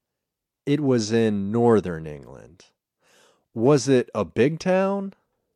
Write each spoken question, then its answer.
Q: Was it a big town?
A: No, it wasn't a big town.